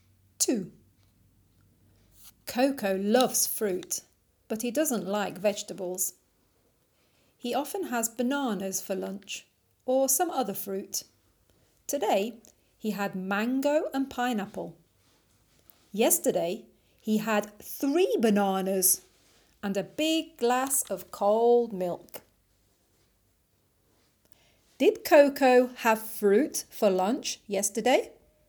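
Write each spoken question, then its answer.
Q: Did Coco have fruit for lunch yesterday?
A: Yes, he had 3 bananas.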